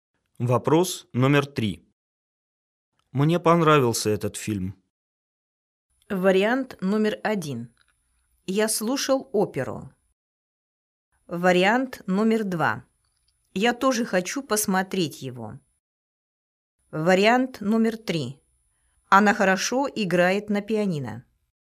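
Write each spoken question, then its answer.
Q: Мне понравился этот фильм.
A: 2: Я тоже хочу посмотреть его.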